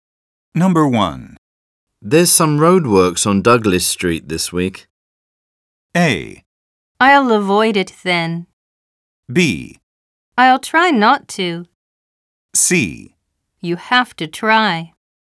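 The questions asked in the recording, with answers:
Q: There's some roadworks on Douglas Street this week.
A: A: I'll avoid it then.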